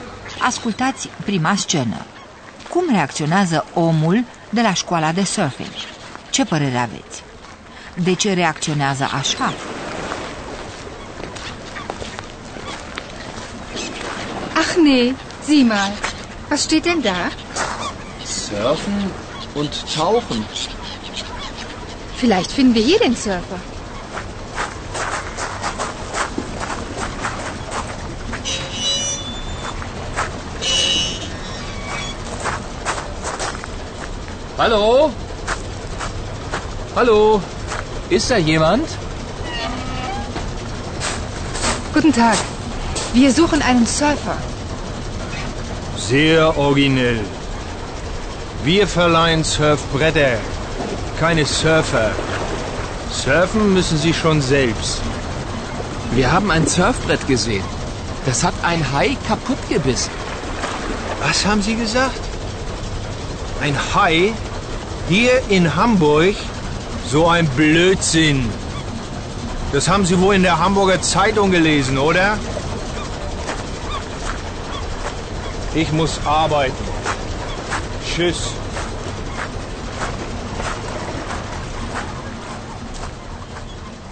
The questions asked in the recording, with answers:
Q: Cum reacționează omul de la școala de surfing?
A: Omul de la școala de surfing e morocănos și prost dispus și reacționează ca atare.